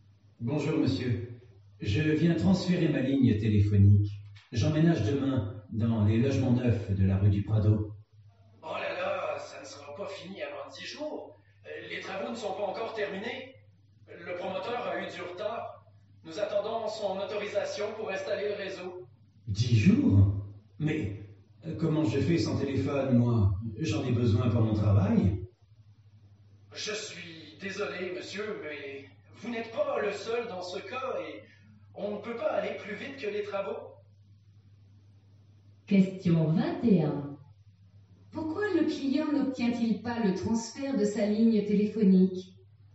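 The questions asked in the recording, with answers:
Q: Pourquoi le client n'obtient-il pas le transfert de sa ligne téléphonique?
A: Parce que les travaux des logements ne sont pas terminés (le promoteur a du retard et l'autorisation pour installer le réseau n'est pas encore donnée).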